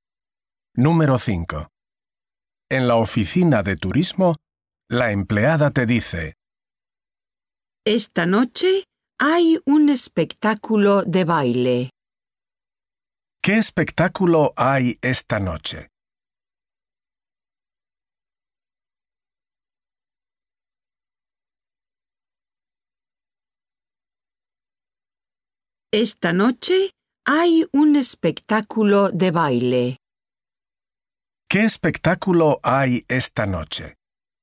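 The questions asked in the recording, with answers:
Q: ¿Qué espectáculo hay esta noche?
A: Un espectáculo de baile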